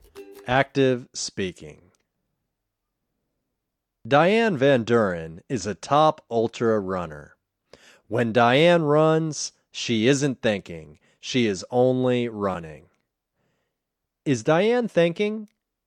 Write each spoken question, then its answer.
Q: Is Diane thinking?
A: No, Diane isn't thinking.